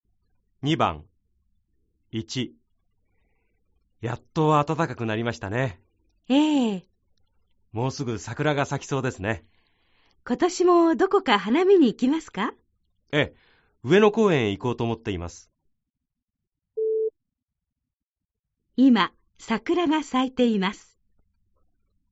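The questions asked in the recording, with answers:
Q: 今、桜が咲いています。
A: ×(まだ咲いていない)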